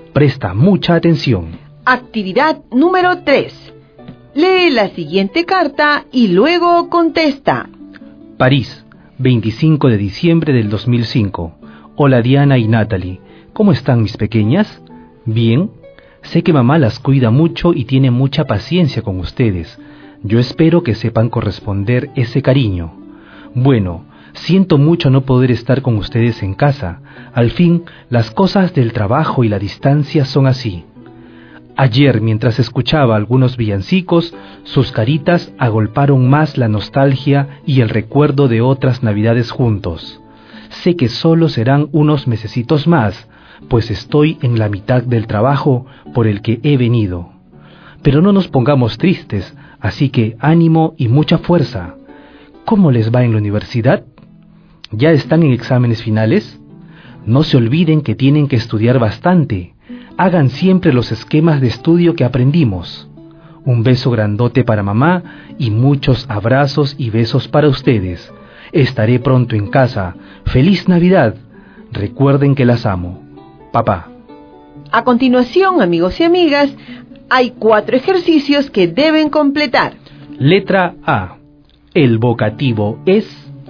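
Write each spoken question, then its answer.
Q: Letra A. El vocativo es...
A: Diana y Natalie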